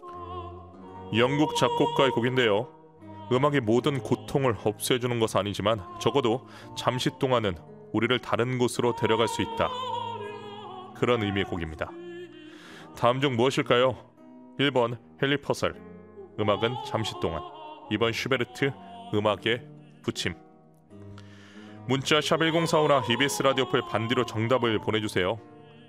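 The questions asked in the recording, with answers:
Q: 다음 중 무엇일까요?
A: 1번: 헨리 퍼셀, 음악은 잠시 동안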